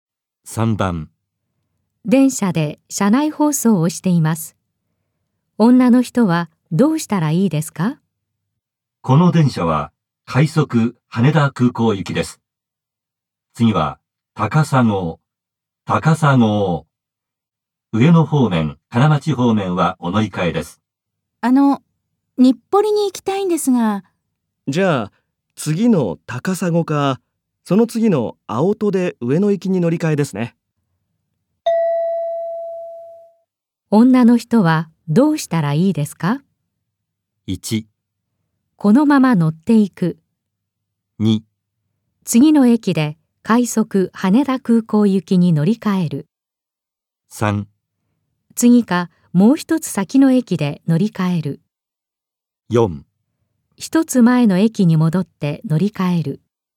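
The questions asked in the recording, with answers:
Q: 女の人はどうしたらいいですか?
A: 3: 次かもう一つ先の駅で乗り換える。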